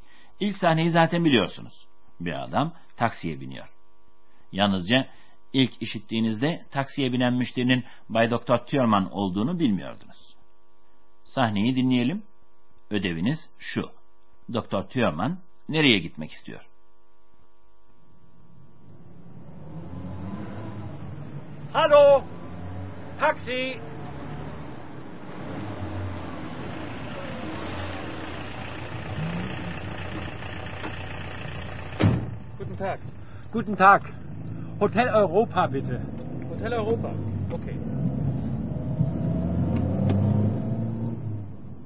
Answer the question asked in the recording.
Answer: Doktor Thürmann taksi şoförüne Hotel Avrupa'ya gitmek istediğini söylüyor.